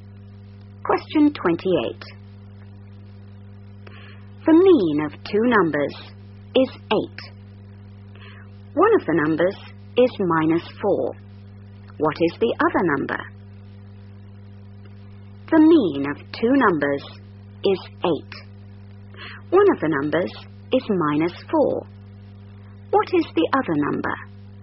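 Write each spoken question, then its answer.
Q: What is the other number?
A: 20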